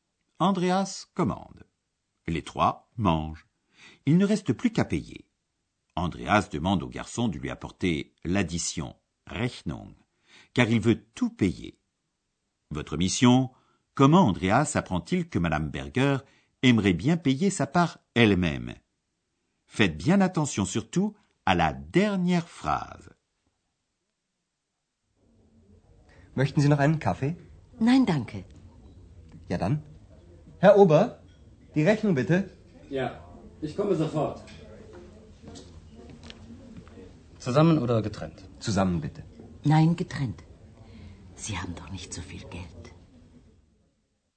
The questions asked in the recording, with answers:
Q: Comment Andreas apprend-il que Madame Berger aimerait bien payer sa part elle-même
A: Madame Berger aimerait payer sa part elle-même, car il n'est pas inhabituel en Allemagne que chacun paie sa part séparément.